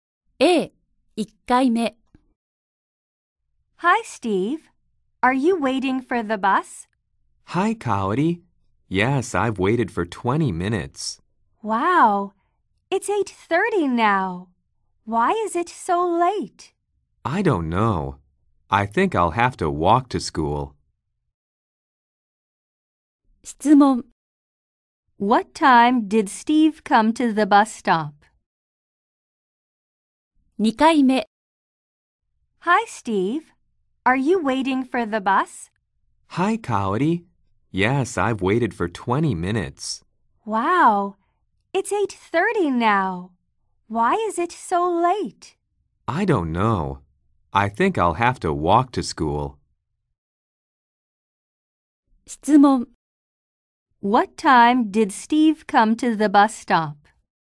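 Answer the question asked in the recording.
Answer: At 8:10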